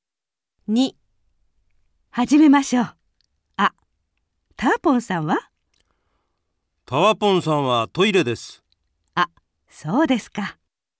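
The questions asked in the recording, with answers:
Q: あ、ターポンさんは?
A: トイレ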